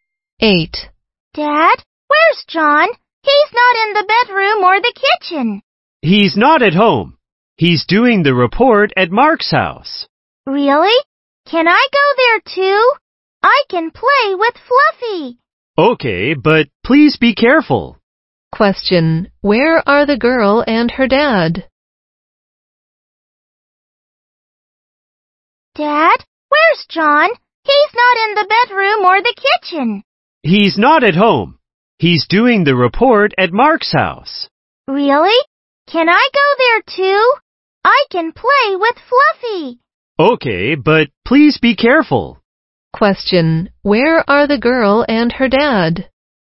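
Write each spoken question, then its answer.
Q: Where are the girl and her dad?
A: At home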